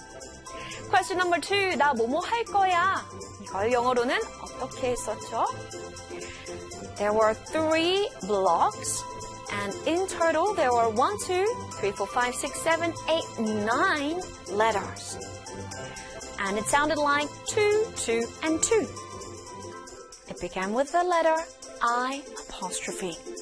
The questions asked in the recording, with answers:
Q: 나 뭐뭐 할 거야?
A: 나 뭐뭐 할 거야 in English is I'm going to.